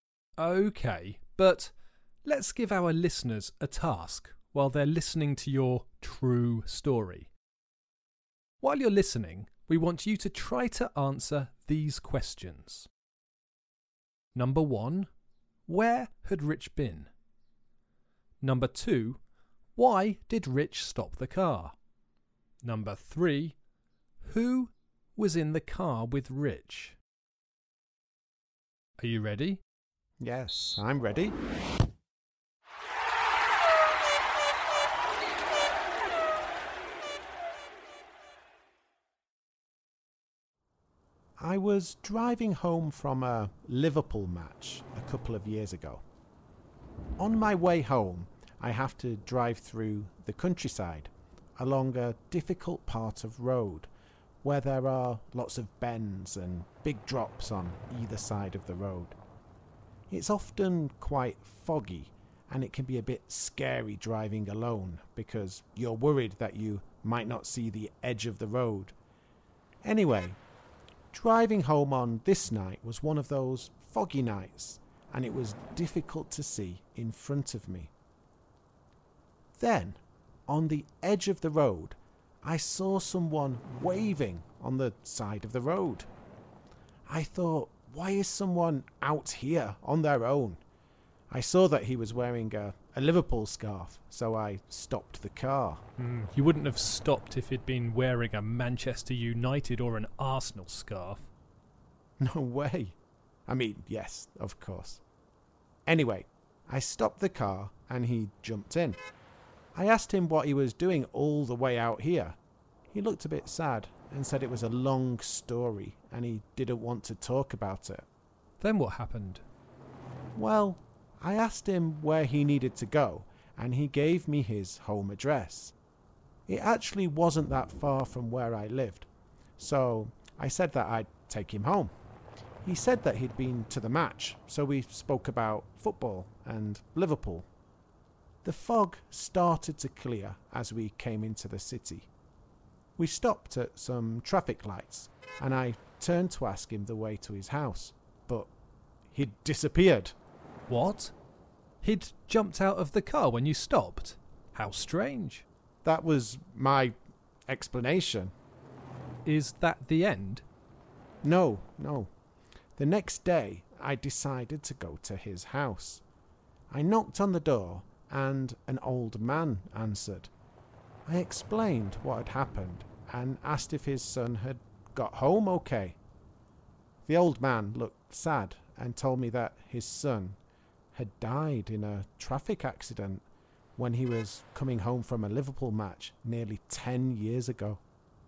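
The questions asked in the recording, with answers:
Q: where had Rich been?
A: At a Liverpool match

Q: why did Rich stop the car?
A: He saw a man waving on the side of the road wearing a Liverpool scarf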